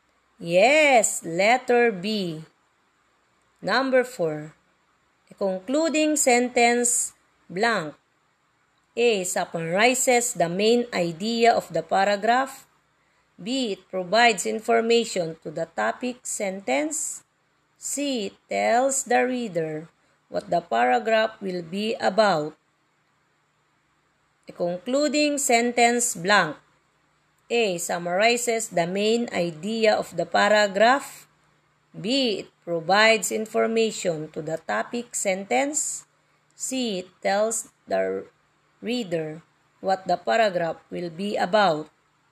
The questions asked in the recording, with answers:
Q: A concluding sentence blank.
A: Yes, letter A, summarizes the main idea of the paragraph.